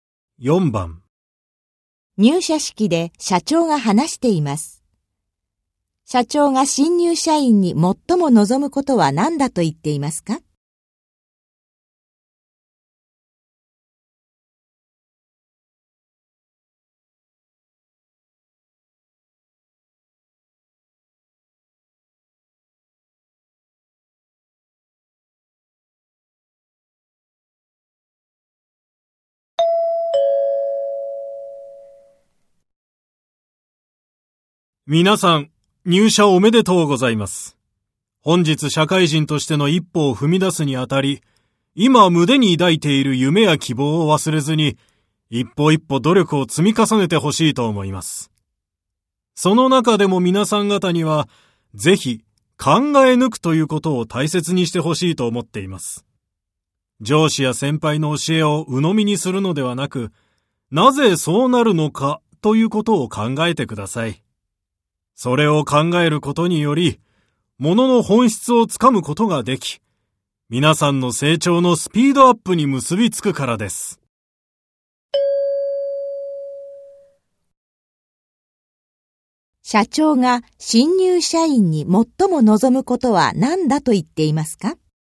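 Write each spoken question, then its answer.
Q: 社長が新入社員に最も望むことは何だと言っていますか?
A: 考え抜くこと(なぜそうなるのかを自分で考えること)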